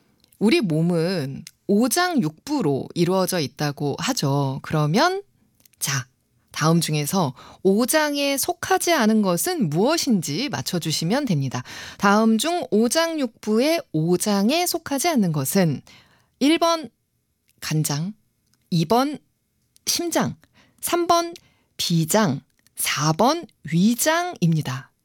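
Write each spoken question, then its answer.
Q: 다음 중 오장육부의 오장에 속하지 않는 것은 1번 간장, 2번 심장, 3번 비장, 4번 위장입니다.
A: 4: 위장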